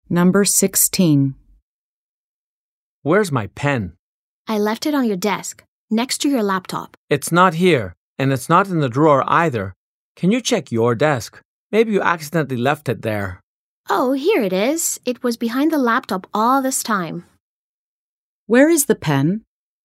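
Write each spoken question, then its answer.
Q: Where is the pen?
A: Behind the laptop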